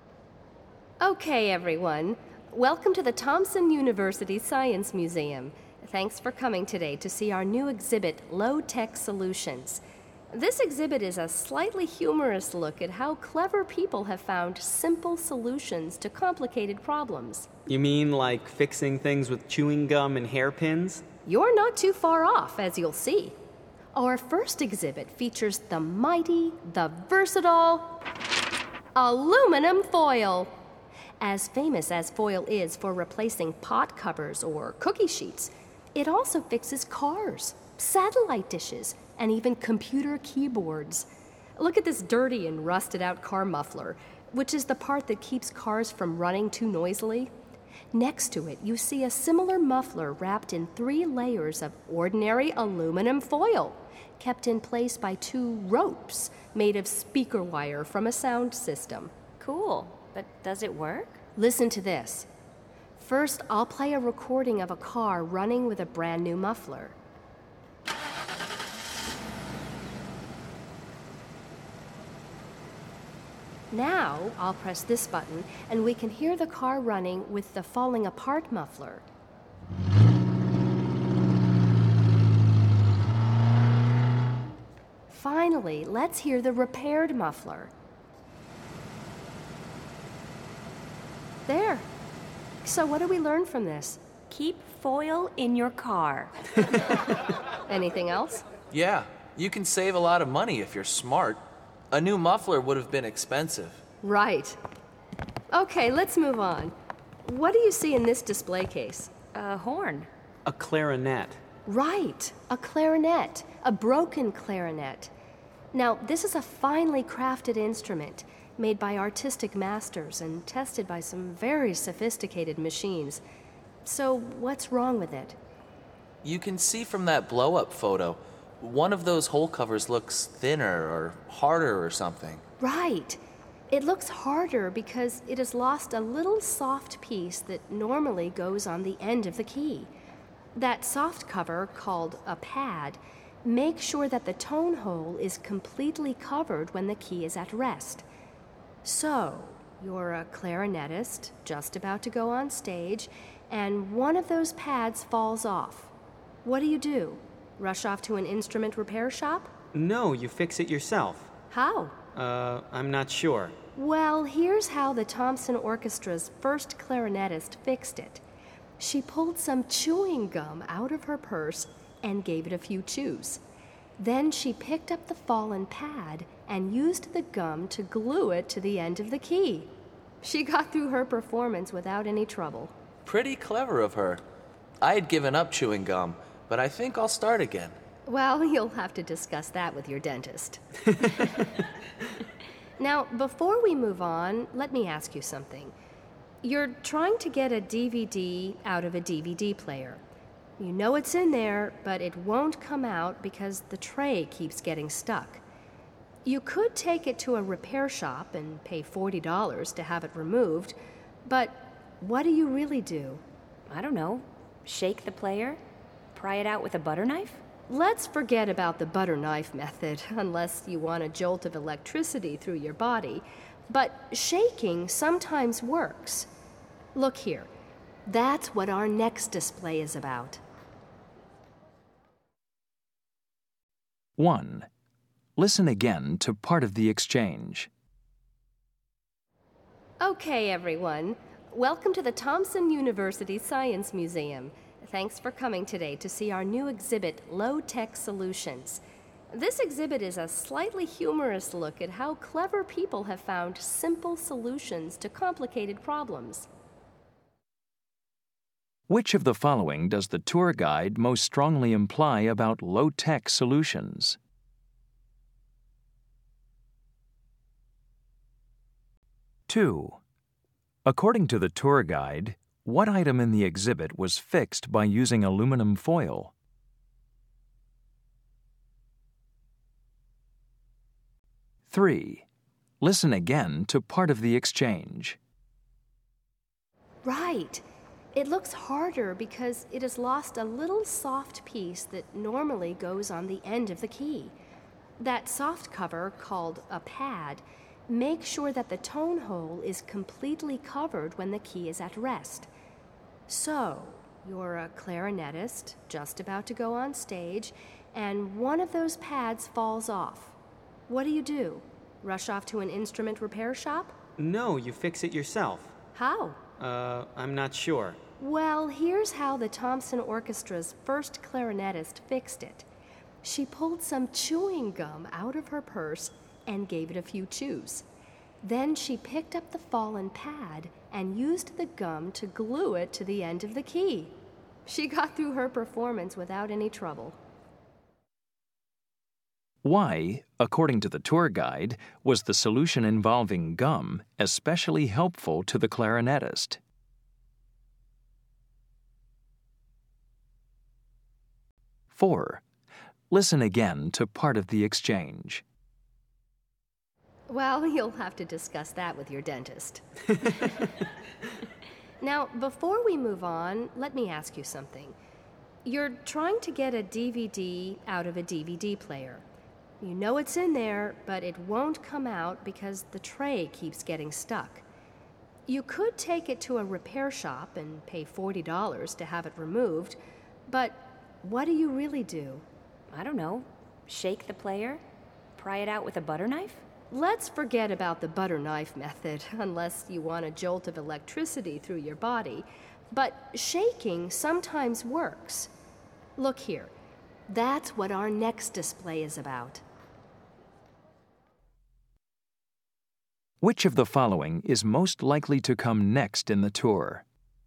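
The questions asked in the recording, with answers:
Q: According to the tour guide, what item in the exhibit was fixed by using aluminum foil?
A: A car muffler

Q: Which of the following is most likely to come next in the tour?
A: A display about shaking a DVD player to free a stuck DVD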